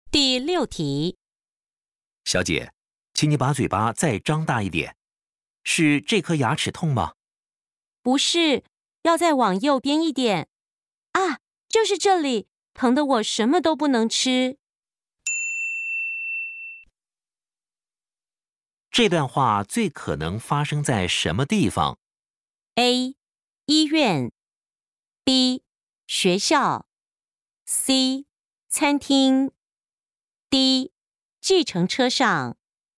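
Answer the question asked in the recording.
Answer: A: 医院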